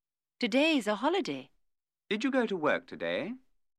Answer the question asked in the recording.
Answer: No, I didn't.